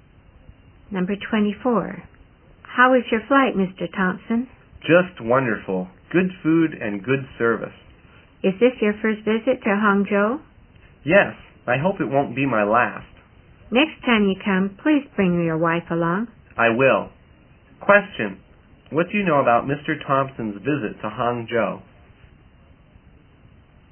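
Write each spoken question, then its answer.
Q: What do you know about Mr.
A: It is his first visit to Hangzhou, and he hopes to come again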